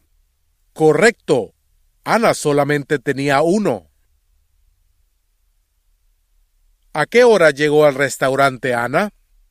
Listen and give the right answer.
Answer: Ana llegó al restaurante a las 12 de la tarde.